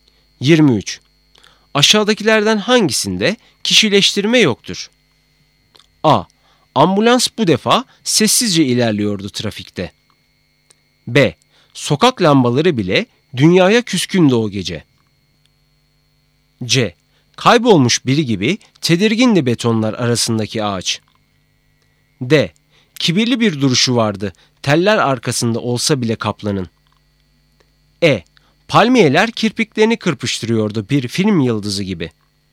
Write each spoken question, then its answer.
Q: Aşağıdakilerden hangisinde kişileştirme yoktur?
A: Doğru cevap A.